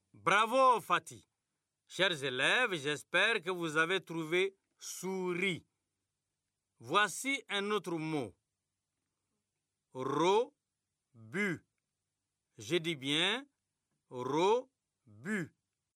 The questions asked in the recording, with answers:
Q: Voici un autre mot. Ro-bu.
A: C'est bureau, monsieur.